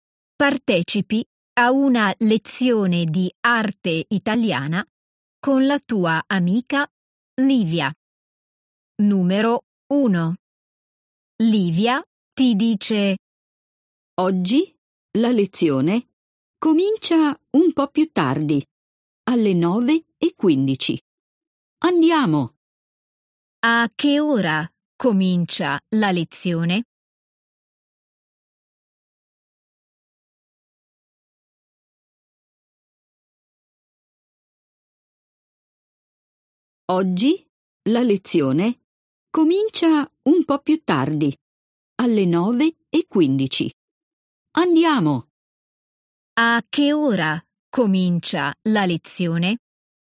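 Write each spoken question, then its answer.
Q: A che ora comincia la lezione?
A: Alle 9:15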